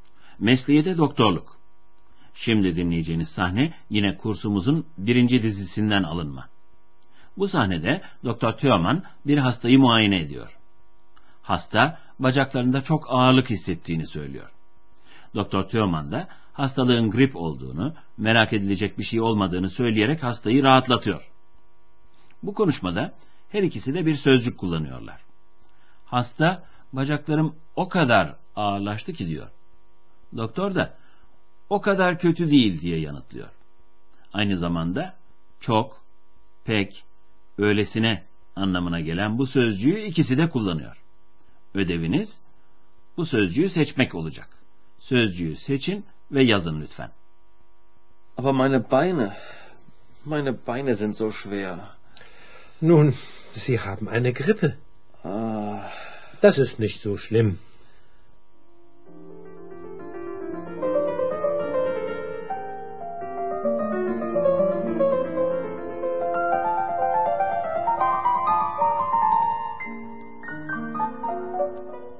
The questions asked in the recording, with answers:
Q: Ödeviniz bu sözcüğü seçmek olacak.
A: zo sözcüğüydü.